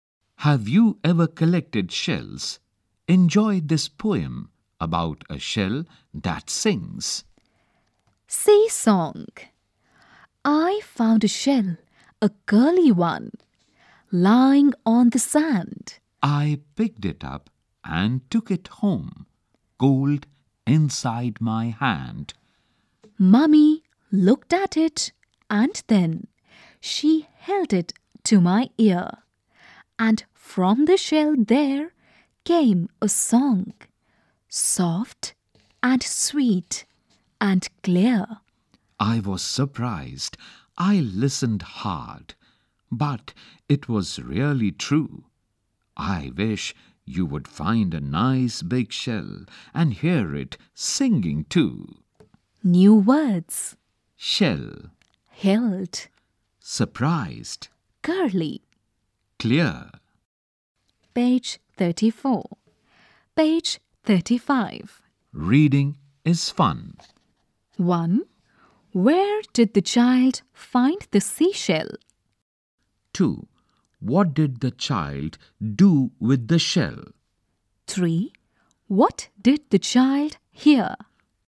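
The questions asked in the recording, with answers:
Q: Where did the child find the seashell?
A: Lying on the sand

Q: What did the child do with the shell?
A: Picked it up and took it home

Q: What did the child hear?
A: A song from the shell, soft and sweet and clear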